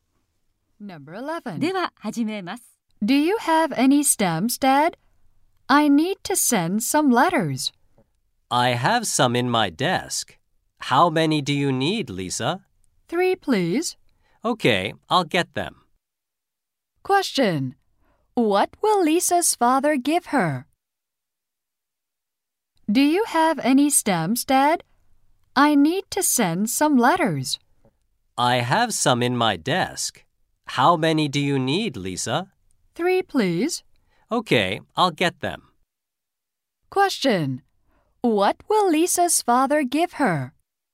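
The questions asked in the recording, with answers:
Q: What will Lisa's father give her?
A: Three stamps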